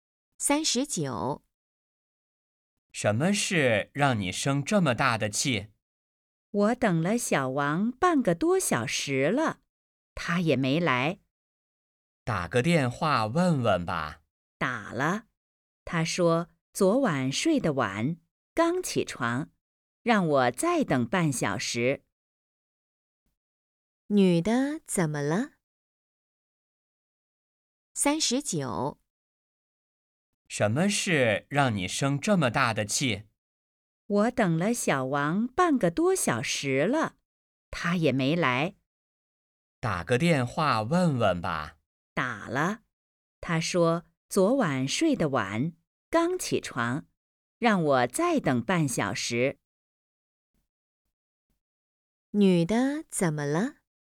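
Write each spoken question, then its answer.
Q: 女的怎么了?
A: 生气了,等小王半个多小时他没来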